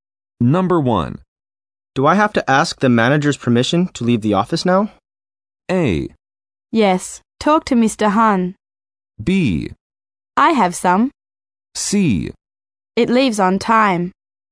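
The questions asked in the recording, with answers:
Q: Do I have to ask the manager's permission to leave the office now?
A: A: Yes, talk to Mr. Han.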